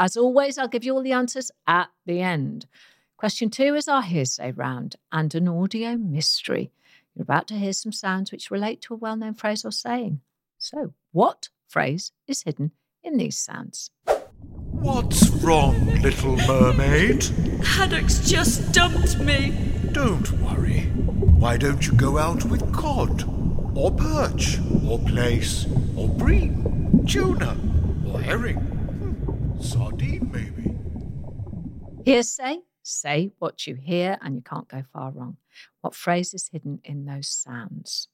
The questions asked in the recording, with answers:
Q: What phrase is hidden in those sounds?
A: there's plenty more fish in the sea